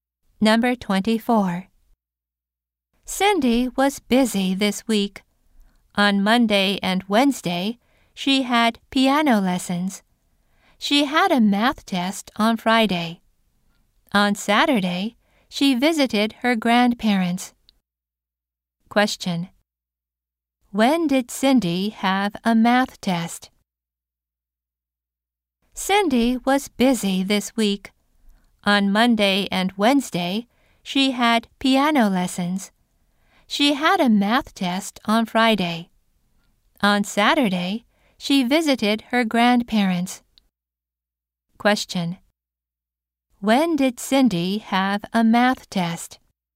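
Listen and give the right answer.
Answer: On Friday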